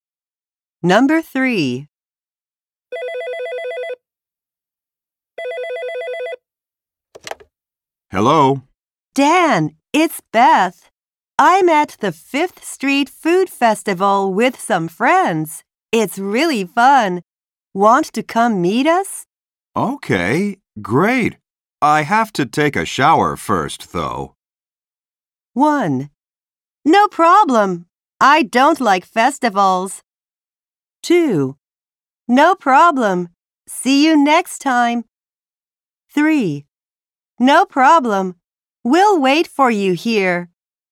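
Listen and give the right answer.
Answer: 3: No problem. We'll wait for you here.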